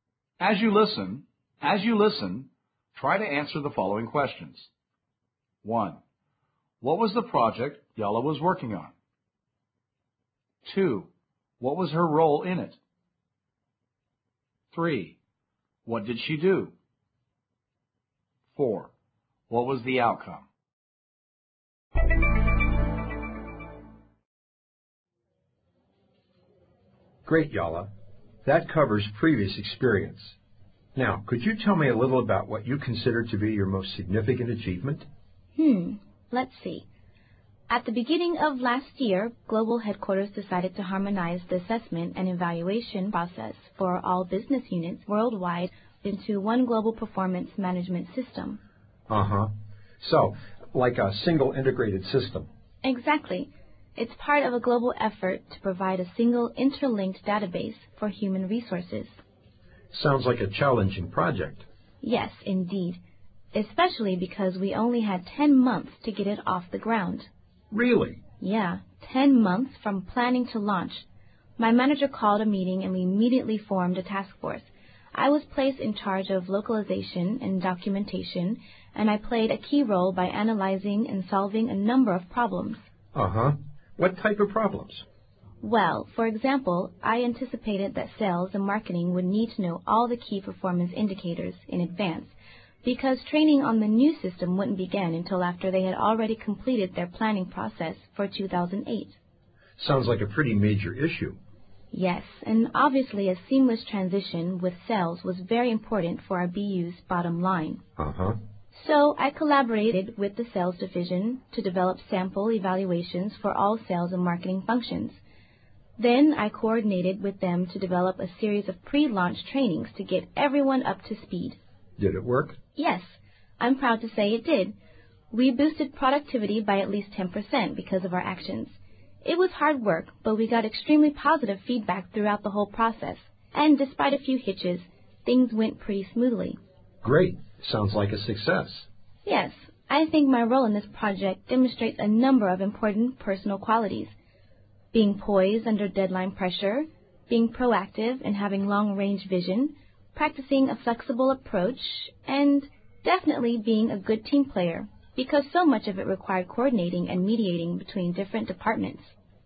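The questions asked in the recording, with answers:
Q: What was the project Yala was working on?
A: Bringing the assessment and evaluation process for all business units worldwide into one global performance management system

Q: What was her role in it?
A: She was in charge of localization and documentation

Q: What did she do?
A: She saw that sales and marketing would need the KPIs early, so she worked with the sales division on sample evaluations and pre-launch trainings

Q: What was the outcome?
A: Productivity went up by at least 10%, feedback was very positive, and things went smoothly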